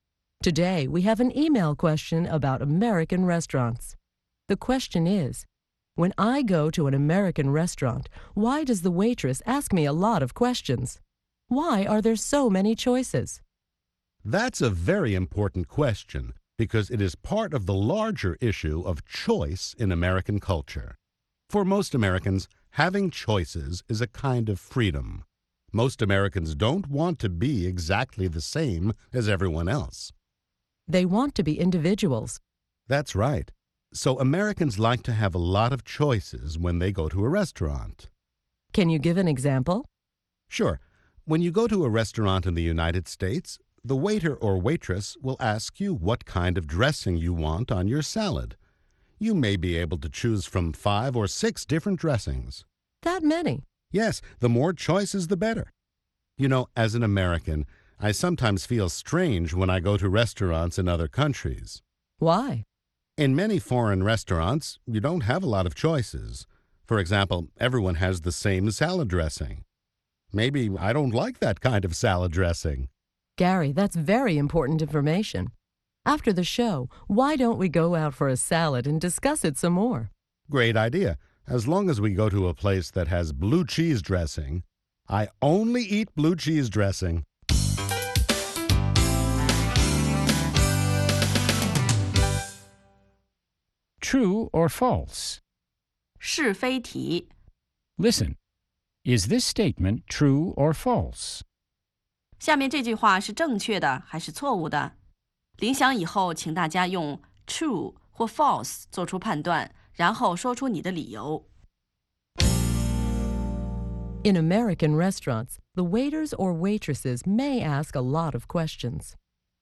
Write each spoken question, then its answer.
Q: In American restaurants, the waiters or waitresses may ask a lot of questions.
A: True.For example, they may ask what kind of salad dressing you want.